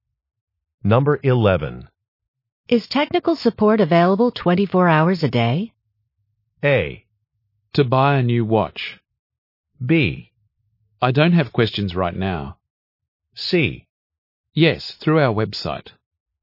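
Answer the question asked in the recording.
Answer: C: Yes, through our website.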